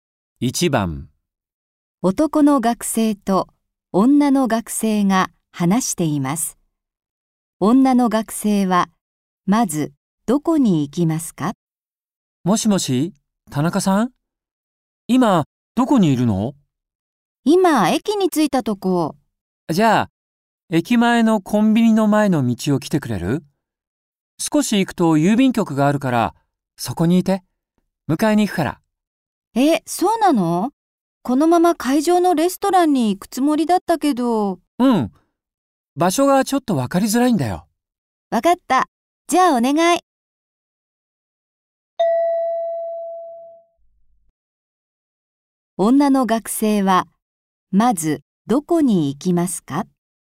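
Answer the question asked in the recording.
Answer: 郵便局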